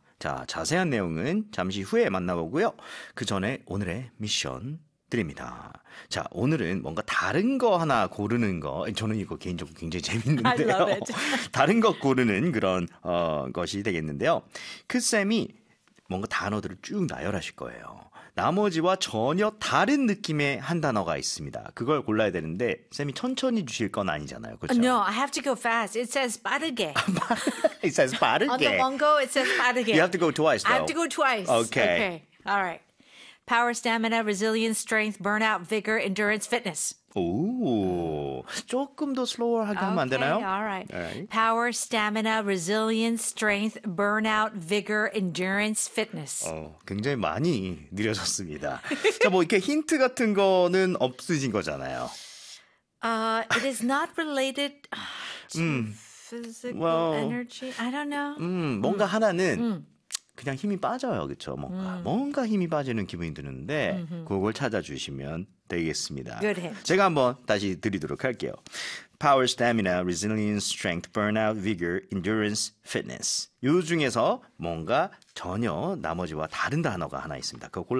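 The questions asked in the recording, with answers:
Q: 요 중에서 뭔가 전혀 나머지와 다른 단어가 하나 있습니다.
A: burnout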